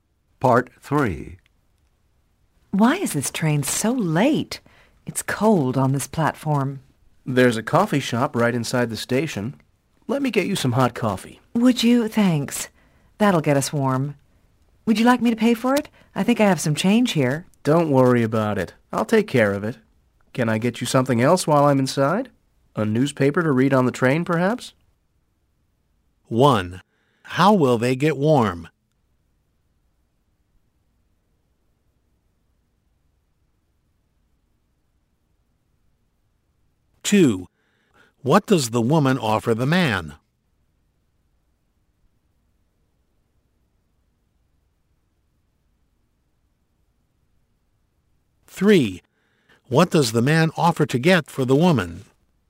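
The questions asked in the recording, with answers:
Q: How will they get warm?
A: By drinking hot coffee

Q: What does the woman offer the man?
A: To pay for the coffee

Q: What does the man offer to get for the woman?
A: A newspaper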